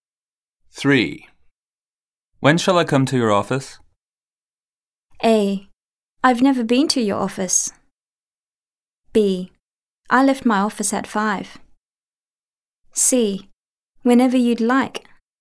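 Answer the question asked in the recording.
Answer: C: Whenever you'd like.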